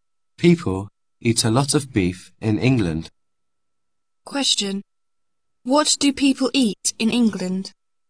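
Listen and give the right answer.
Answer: beef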